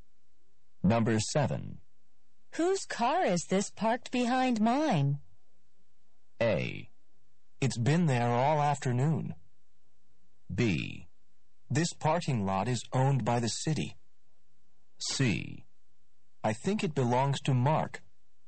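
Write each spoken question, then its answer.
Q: Whose car is this parked behind mine?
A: C: I think it belongs to Mark.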